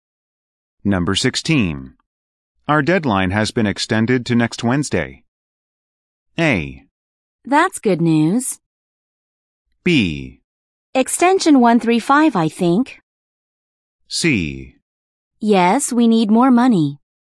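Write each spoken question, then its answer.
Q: Our deadline has been extended to next Wednesday.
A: A: That's good news.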